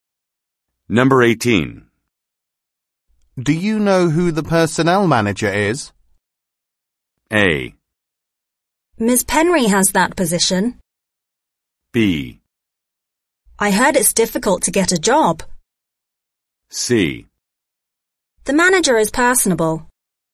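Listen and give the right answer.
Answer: A: Ms. Penry has that position.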